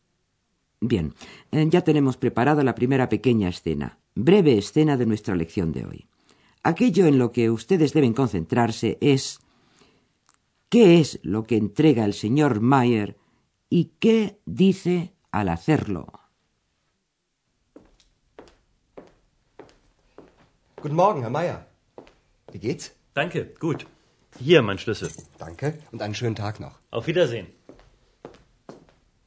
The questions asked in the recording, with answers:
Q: ¿qué es lo que entrega el señor Mayer y qué dice al hacerlo?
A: El señor Mayer ha depositado la llave de su habitación en el mostrador de recepción y dice, aquí tiene mi llave.